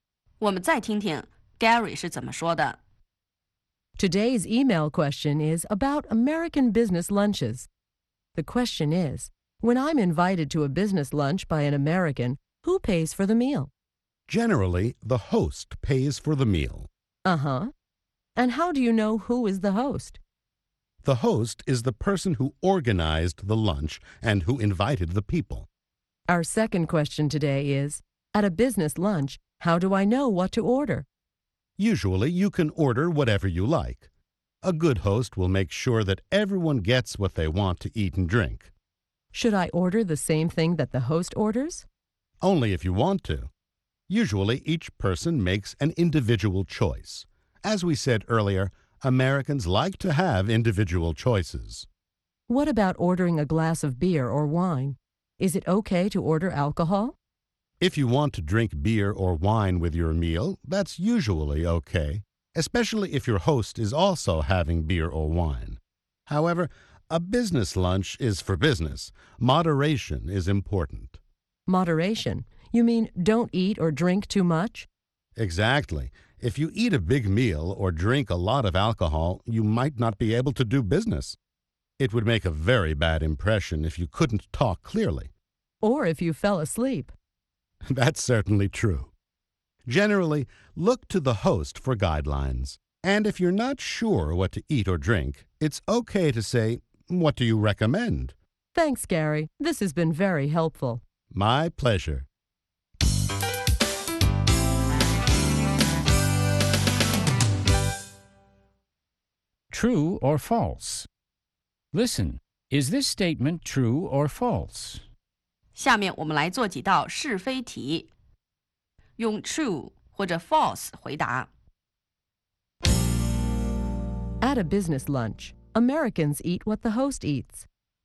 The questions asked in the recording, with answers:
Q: At a business lunch, Americans eat what the host eats.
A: False. Americans eat whatever they want to eat.